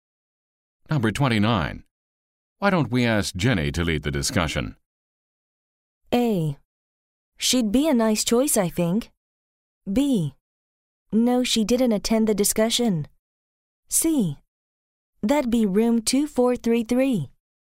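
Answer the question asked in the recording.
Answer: A: She'd be a nice choice, I think.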